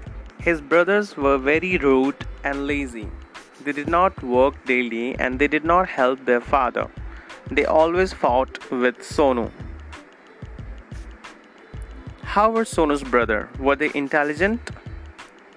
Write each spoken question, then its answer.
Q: How were Sonu's brother? Were they intelligent?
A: No, they were not intelligent.